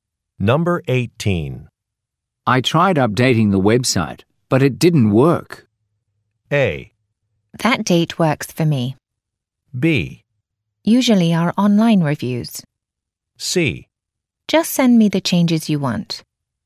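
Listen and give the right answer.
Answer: C: Just send me the changes you want.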